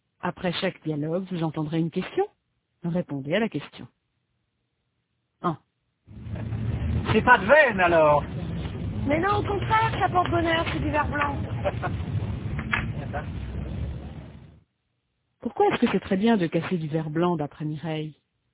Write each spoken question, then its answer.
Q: Pourquoi est-ce que c'est très bien de casser du verre blanc d'après Mireille?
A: Parce que ça porte bonheur.